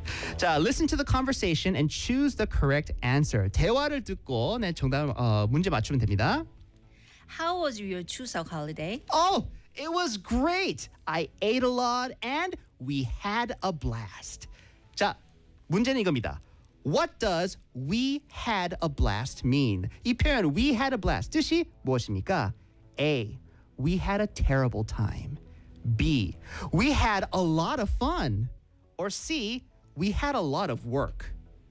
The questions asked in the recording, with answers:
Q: What does we had a blast mean?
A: 정답은 B. We had a lot of fun.